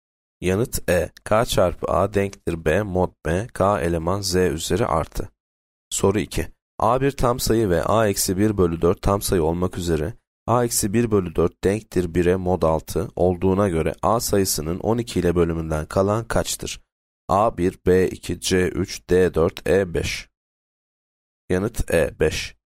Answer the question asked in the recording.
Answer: Yanıt E 5.